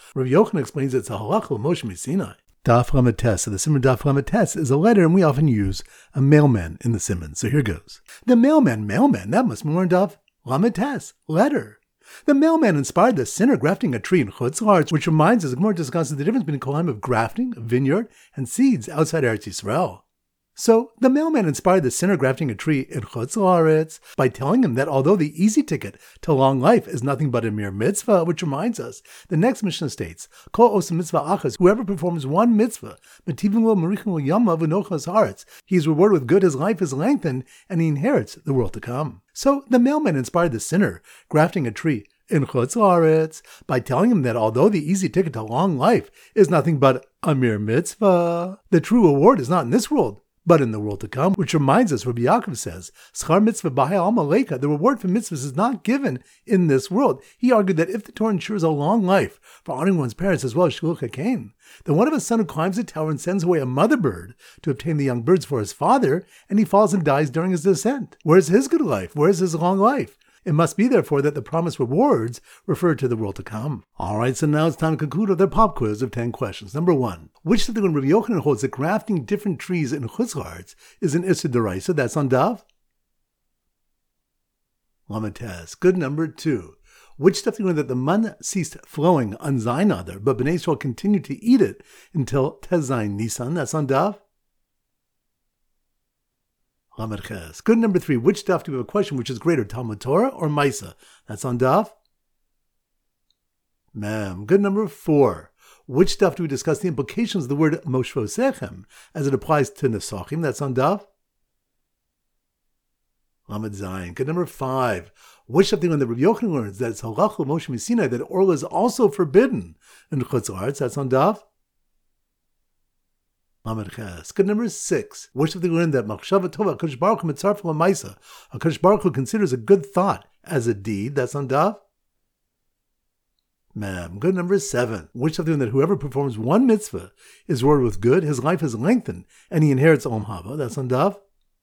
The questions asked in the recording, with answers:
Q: Which of them that whoever performs one mitzvah is rewarded with good, his life is lengthened, and he inherits Olam Haba.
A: Lamatas.